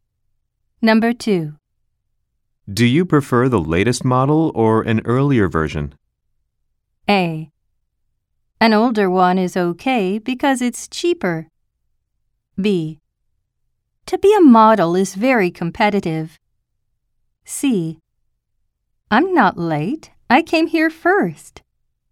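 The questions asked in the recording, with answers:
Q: Do you prefer the latest model or an earlier version?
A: A: An older one is okay because it's cheaper.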